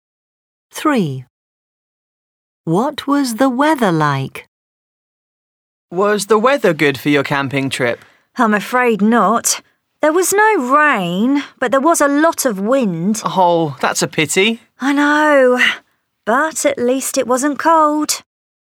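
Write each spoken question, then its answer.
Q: What was the weather like?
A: Windy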